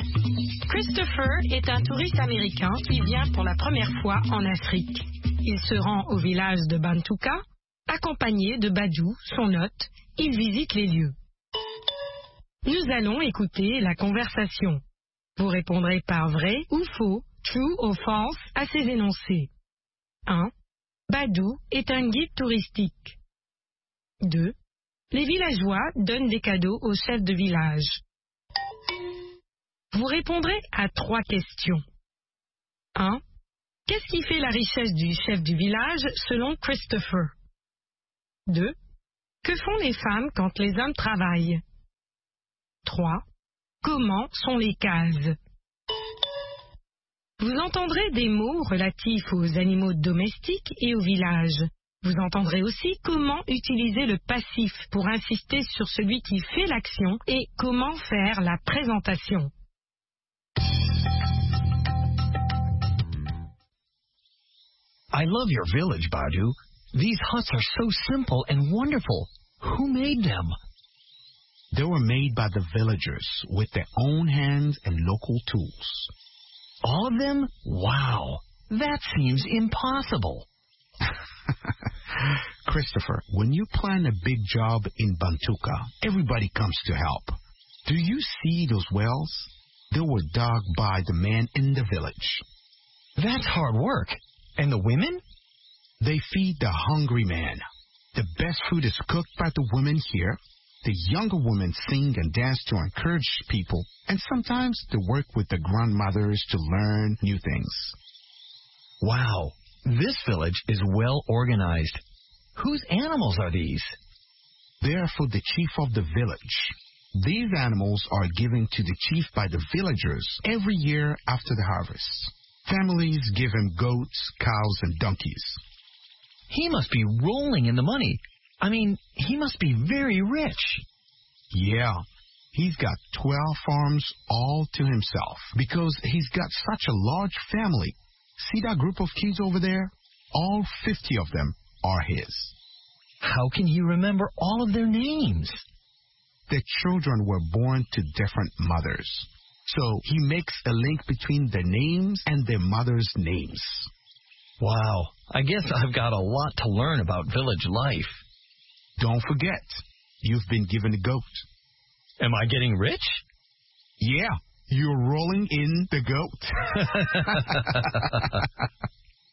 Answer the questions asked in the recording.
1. L'énoncé 1 est faux.
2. L'énoncé 2 est vrai.
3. Ses ânes, ses vaches et ses chèvres.
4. Elles cuisinent.
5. Elles sont simples et formidables.